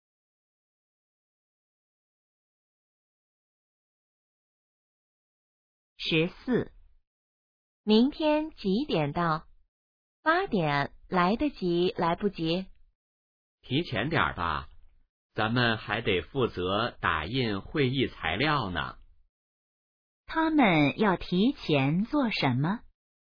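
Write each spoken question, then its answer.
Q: 他们要提前做什么?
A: 打印会议材料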